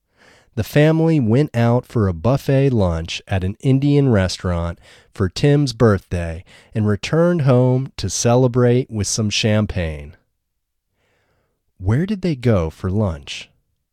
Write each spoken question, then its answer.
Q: Where did they go for lunch?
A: They went to a buffet lunch at an Indian restaurant.